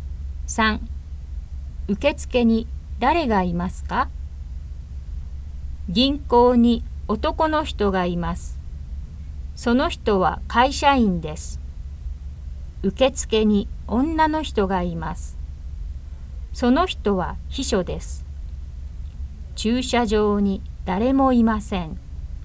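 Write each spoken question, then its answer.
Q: 受付に誰がいますか?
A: 女の人(秘書)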